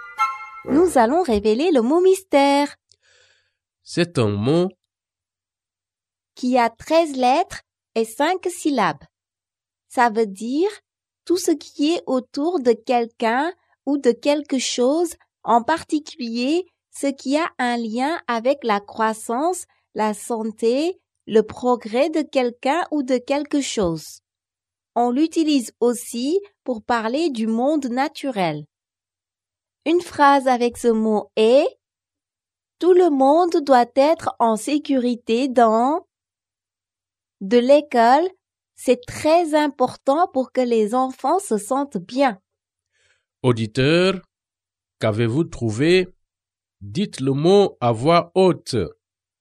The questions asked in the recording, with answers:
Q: Auditeur, qu'avez-vous trouvé?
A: Le mot mystère est environnement.